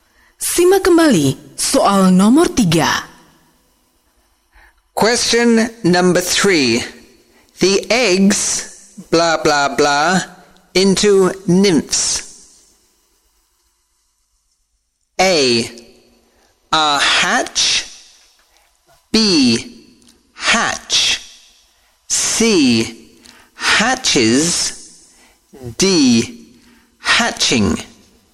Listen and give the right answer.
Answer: B. Hatch.